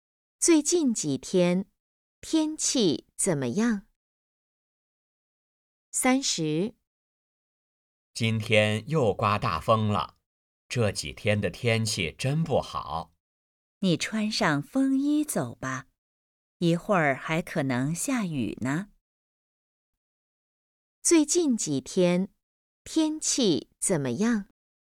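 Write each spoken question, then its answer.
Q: 最近几天,天气怎么样?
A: 不好,常刮大风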